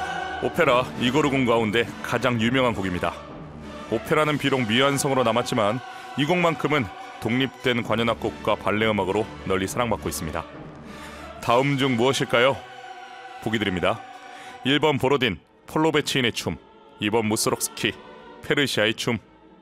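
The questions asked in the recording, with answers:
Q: 다음 중 무엇일까요?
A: 1번: 보로딘, 폴로베치인의 춤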